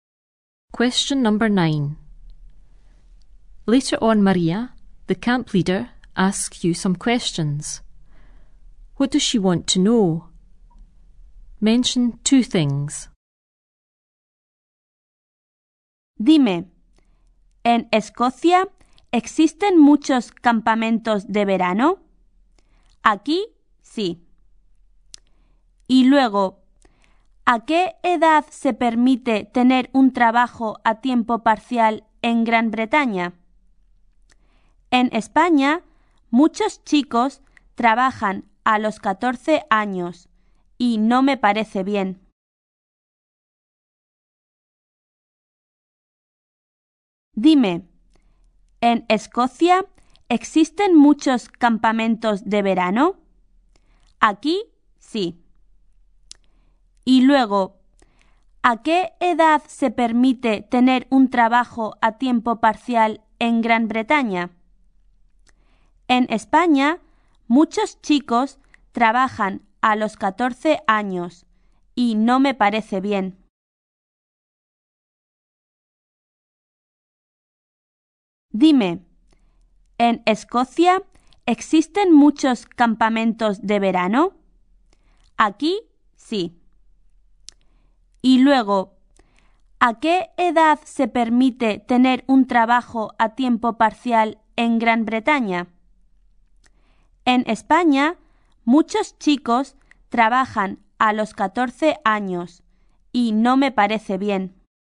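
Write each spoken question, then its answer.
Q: What does she want to know?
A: Whether there are many summer camps in Scotland, and at what age you can have a part-time job in Britain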